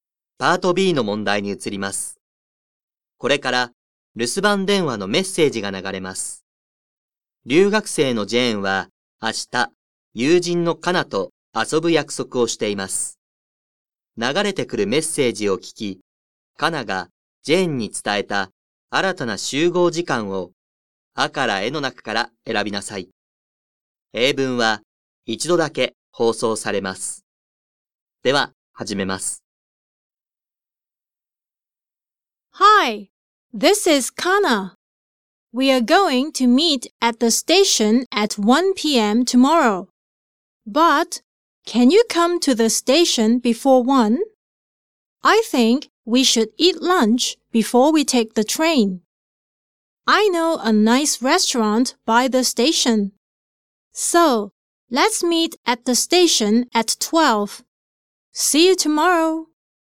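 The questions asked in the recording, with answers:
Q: 流れてくるメッセージを聞き、カナがジェーンに伝えた新たな集合時間をアからエの中から選びなさい。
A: 12時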